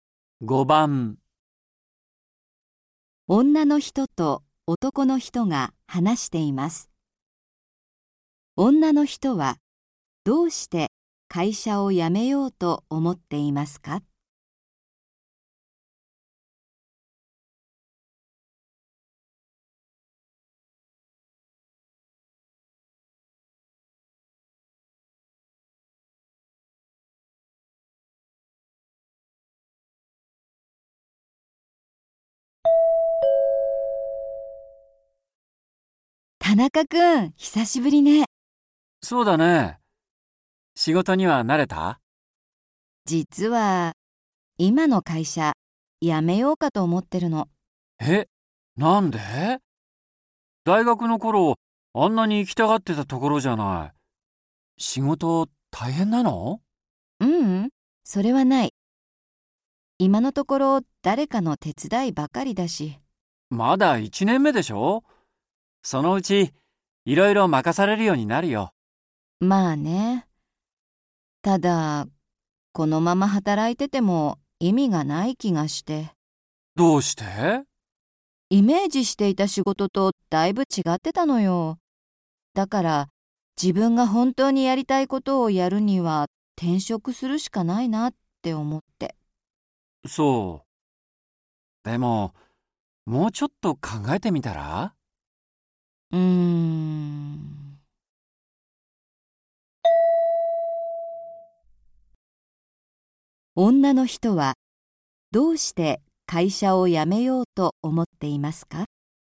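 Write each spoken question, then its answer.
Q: 女の人はどうして会社を辞めようと思っていますか?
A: イメージしていた仕事とだいぶ違っていたから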